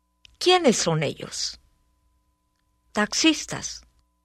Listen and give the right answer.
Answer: Ellos son taxistas.